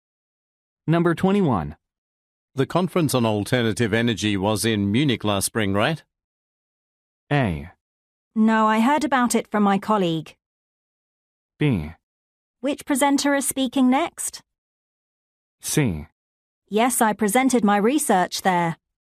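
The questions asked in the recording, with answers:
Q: The conference on alternative energy was in Munich last spring, right?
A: C: Yes, I presented my research there.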